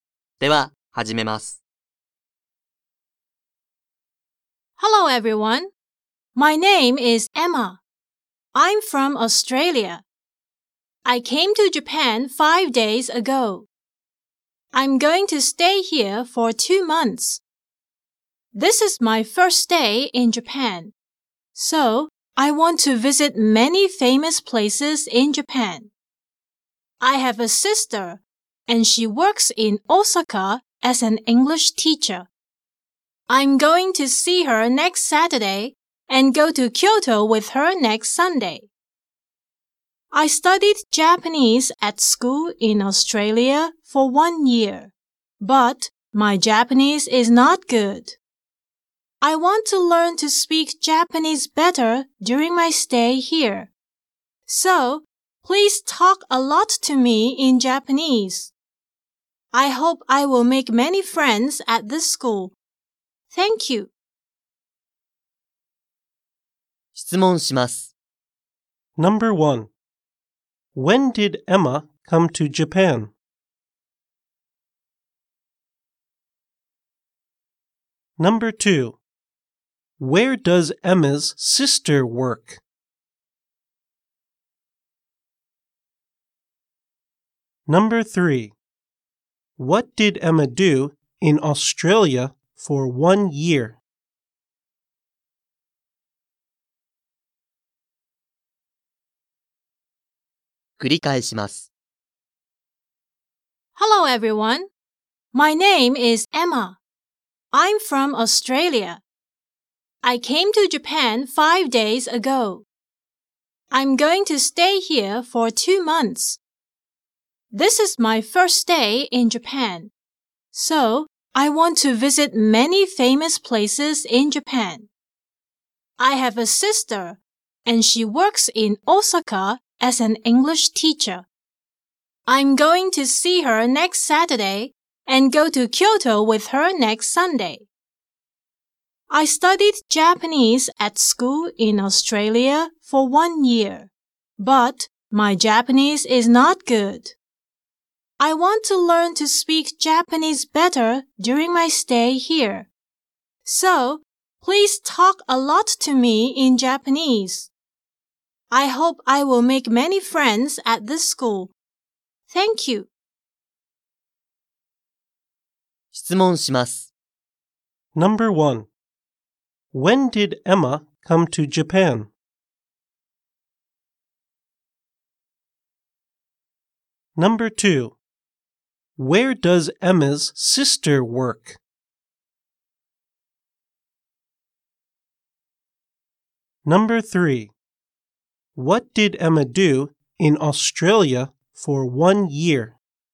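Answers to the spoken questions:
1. 5 days ago
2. In Osaka
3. She studied Japanese at school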